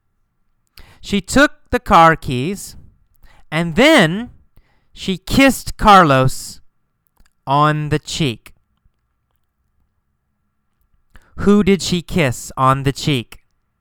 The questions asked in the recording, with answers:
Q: Who did she kiss on the cheek?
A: Carlos. She kissed Carlos on the cheek.